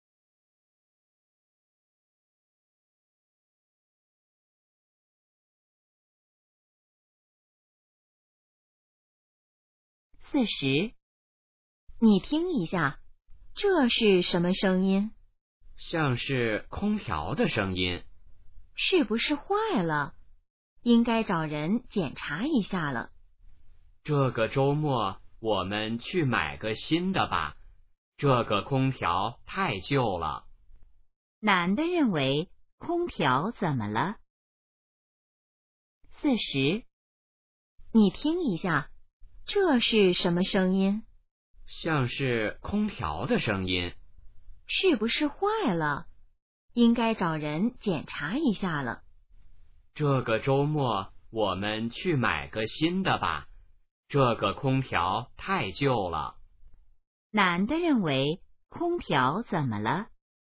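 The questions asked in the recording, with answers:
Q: 男的认为空调怎么了?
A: 太旧了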